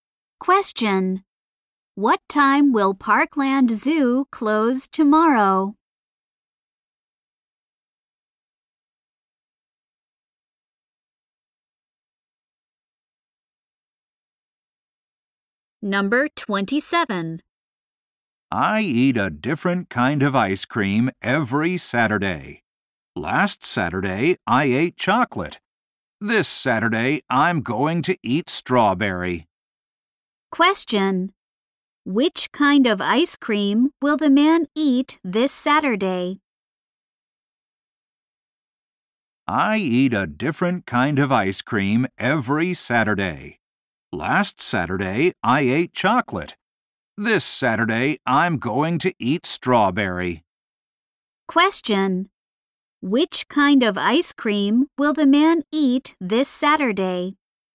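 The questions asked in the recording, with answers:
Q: Which kind of ice cream will the man eat this Saturday?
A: Strawberry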